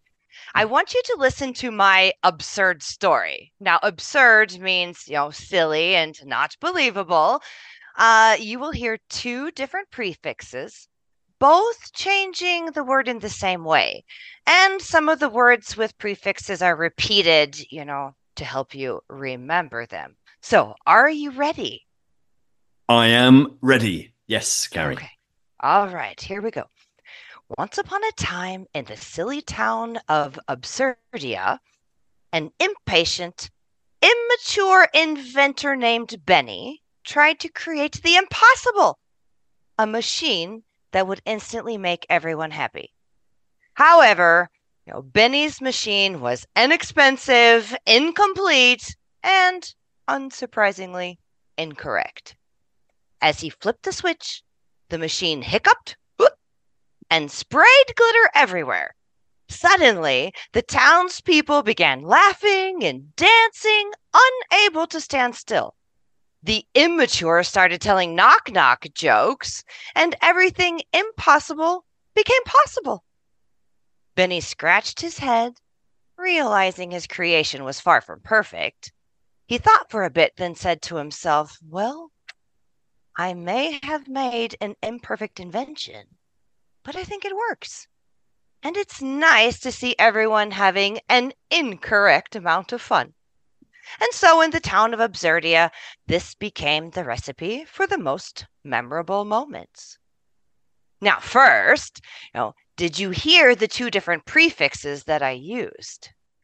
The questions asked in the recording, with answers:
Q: Now, first, you know, did you hear the two different prefixes that I used?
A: I think the two that you were focusing on were im and in.